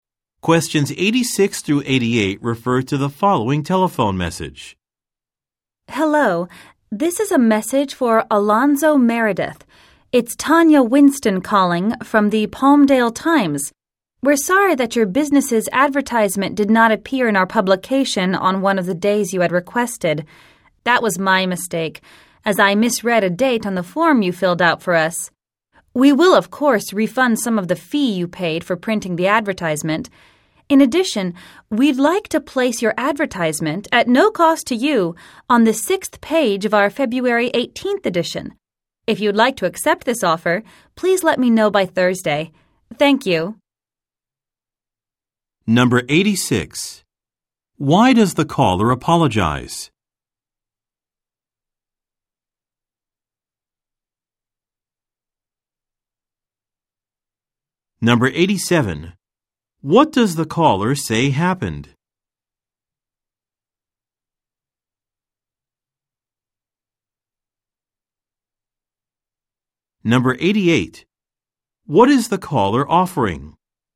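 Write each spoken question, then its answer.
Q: Why does the caller apologize?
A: An advertisement did not appear in the publication on a requested day

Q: What does the caller say happened?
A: She misread a date on the form

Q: What is the caller offering?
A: To run the advertisement free of charge on page six of the February 18th edition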